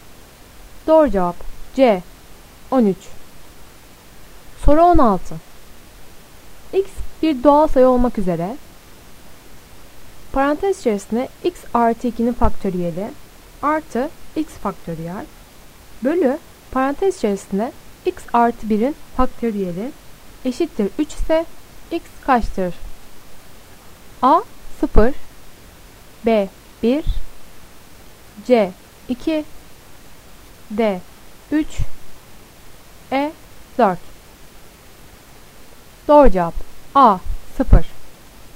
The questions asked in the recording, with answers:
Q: X bir doğal sayı olmak üzere parantez içerisinde x artı 2'nin faktöriyeli artı x faktöriyel bölü parantez içerisinde x artı 1'in faktöriyeli eşittir 3 ise x kaçtır?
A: Doğru cevap A 0.